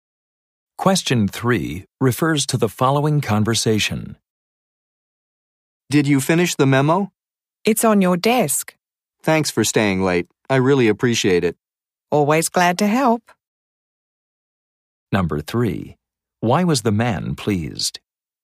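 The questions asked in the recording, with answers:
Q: Why was the man pleased?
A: The woman stayed late and finished the memo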